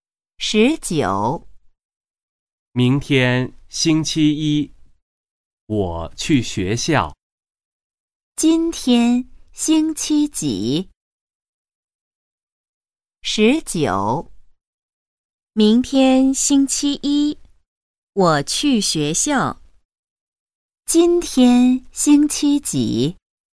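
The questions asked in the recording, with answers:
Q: 今天星期几?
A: 星期日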